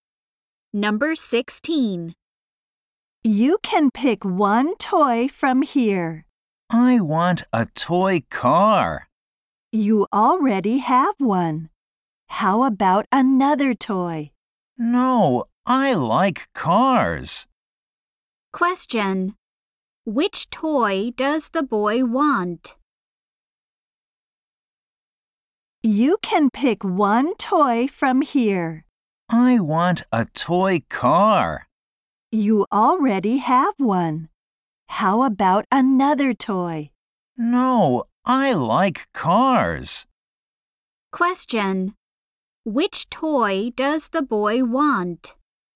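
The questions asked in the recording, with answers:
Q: Which toy does the boy want?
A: A toy car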